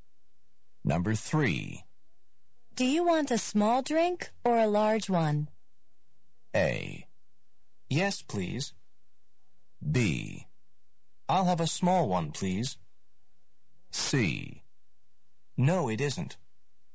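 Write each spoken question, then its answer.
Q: Do you want a small drink or a large one?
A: B: I'll have a small one, please.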